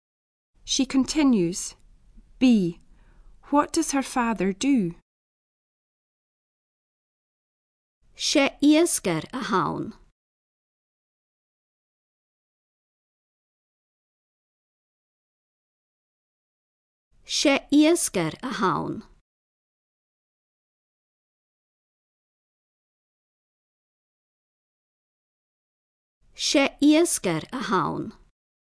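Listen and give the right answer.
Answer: He is a fisherman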